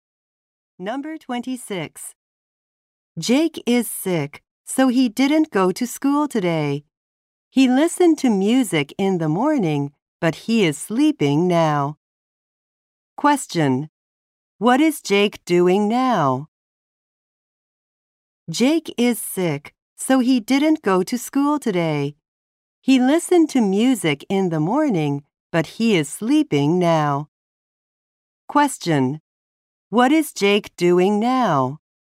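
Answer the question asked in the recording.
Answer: Sleeping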